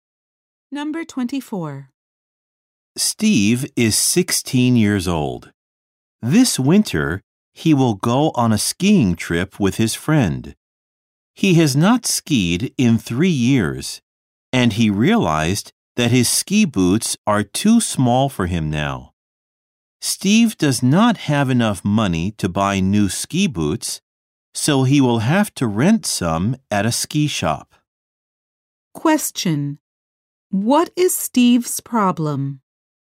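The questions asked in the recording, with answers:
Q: What is Steve's problem?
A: His ski boots are too small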